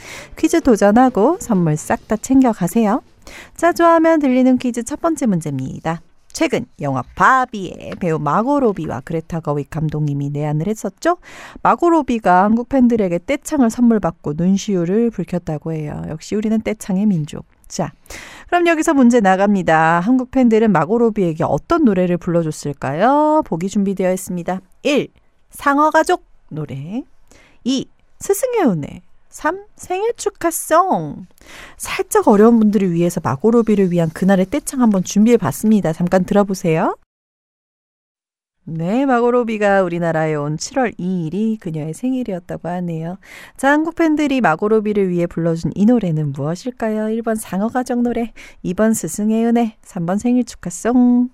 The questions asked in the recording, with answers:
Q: 자, 한국 팬들이 마고로비를 위해 불러준 이 노래는 무엇일까요?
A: 정답은 바로 3번 생일 축하송입니다.